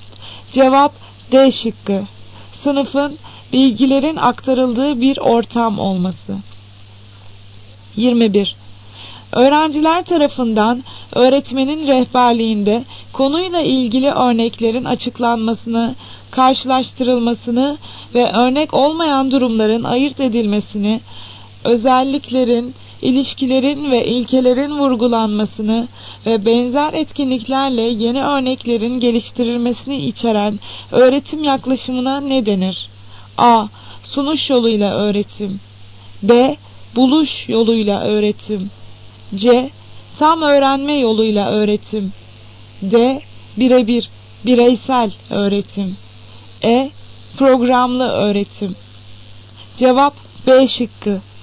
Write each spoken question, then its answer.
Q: Öğrenciler tarafından öğretmenin rehberliğinde konuyla ilgili örneklerin açıklanmasını, karşılaştırılmasını ve örnek olmayan durumların ayırt edilmesini, özelliklerin, ilişkilerin ve ilkelerin vurgulanmasını ve benzer etkinliklerle yeni örneklerin geliştirilmesini içeren öğretim yaklaşımına ne denir?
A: Cevap B şıkkı. Buluş yoluyla öğretim.